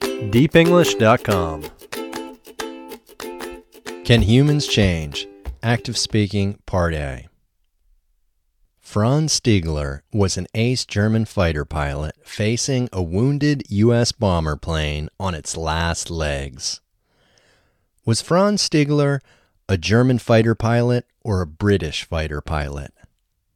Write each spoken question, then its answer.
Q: Was Franz Stiegler a German fighter pilot or a British fighter pilot?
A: Franz Stiegler was a German fighter pilot.